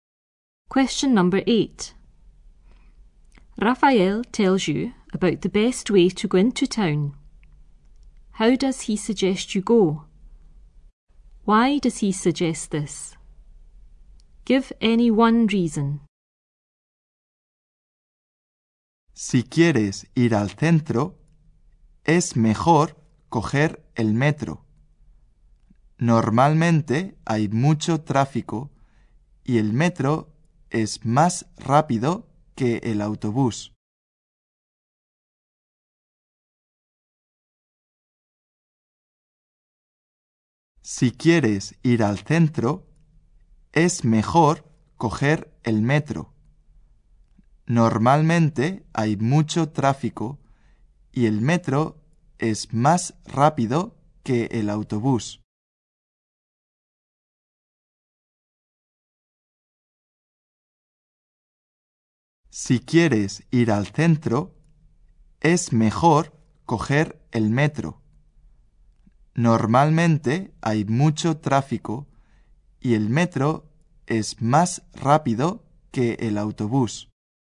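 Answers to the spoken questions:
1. By metro (underground)
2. There is usually a lot of traffic / the metro is faster than the bus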